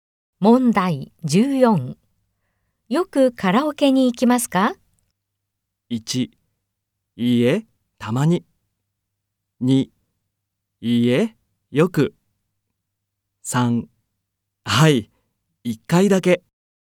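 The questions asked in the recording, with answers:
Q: よくカラオケに行きますか?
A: 2: いいえ、たまに。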